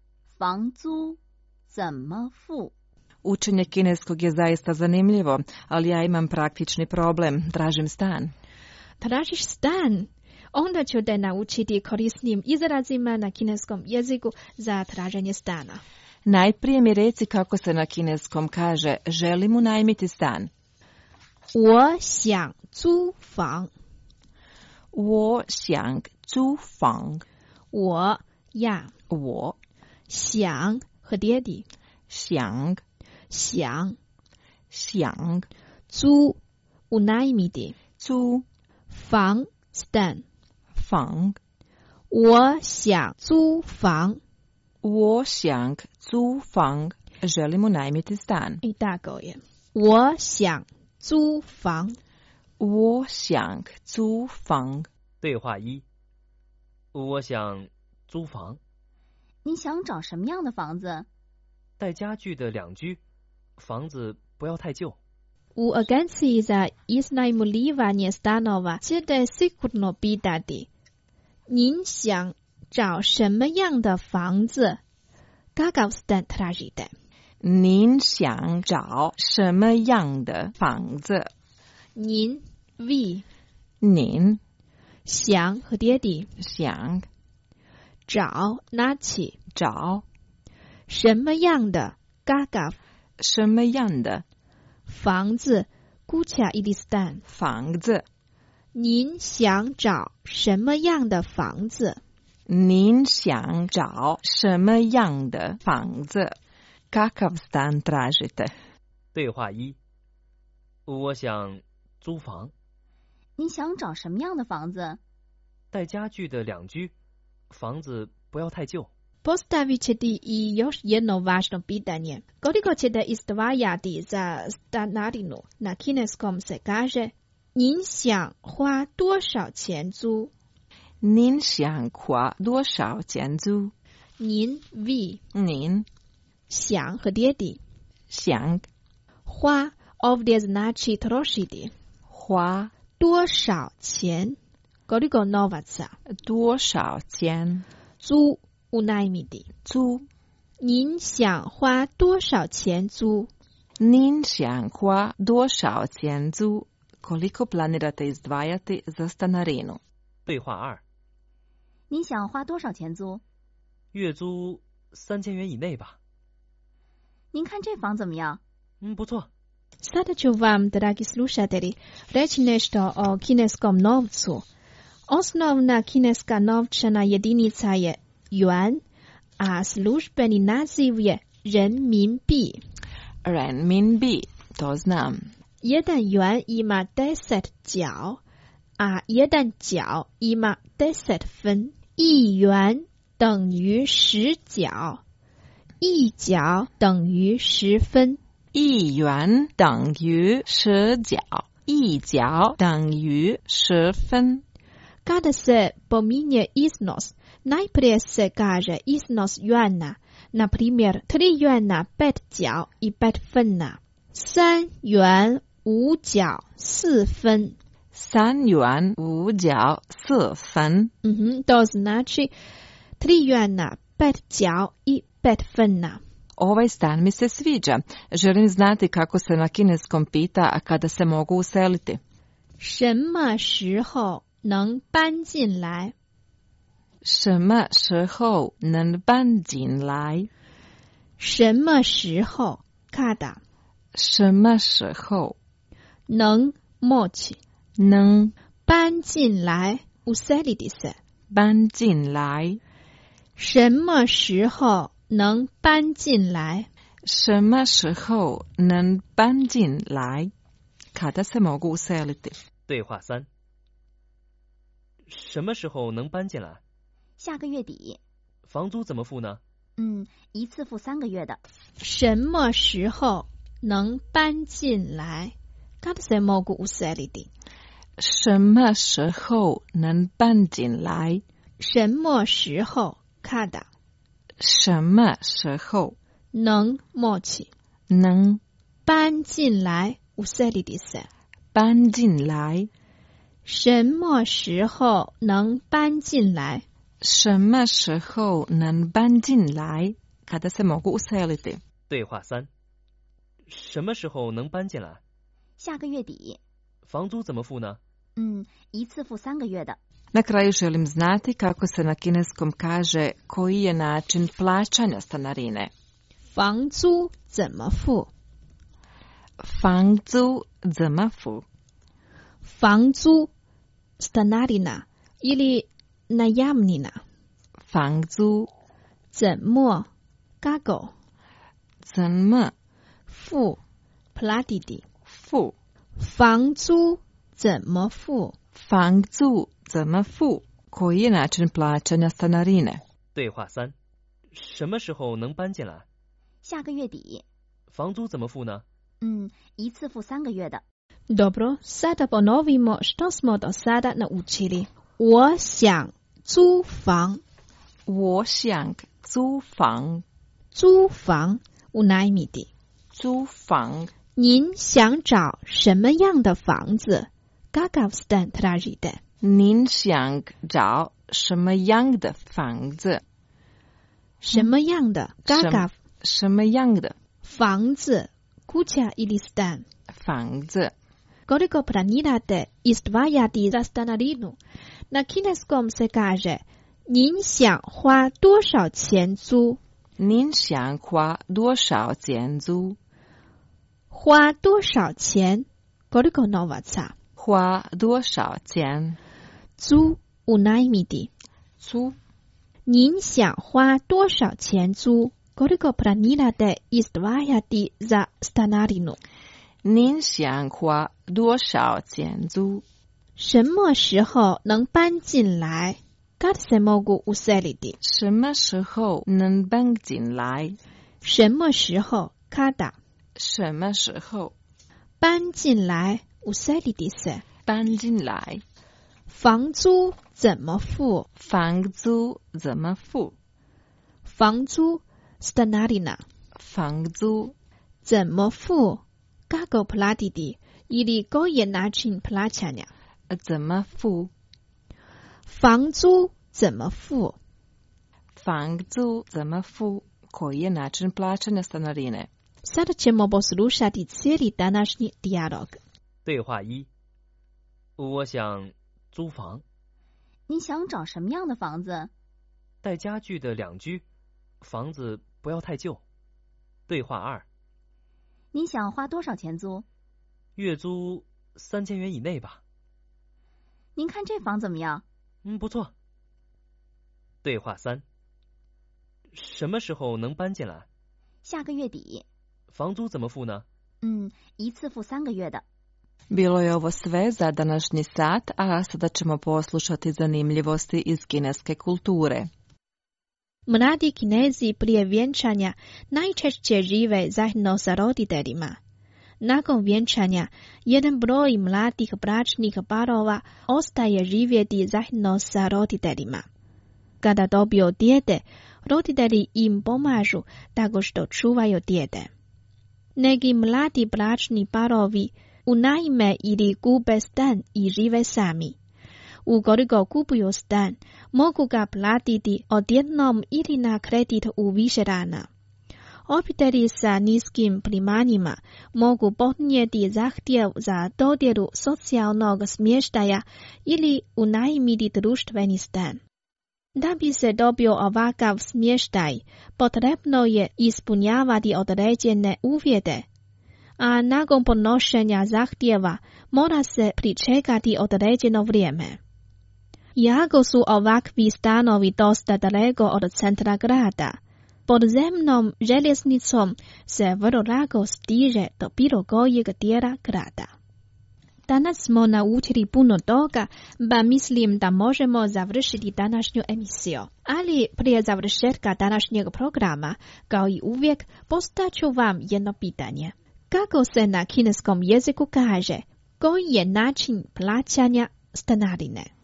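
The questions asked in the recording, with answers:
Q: Kako se na kineskom jeziku kaže, koji je način plaćanja stanarine?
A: 房租怎么付? (Fangzu zenme fu?)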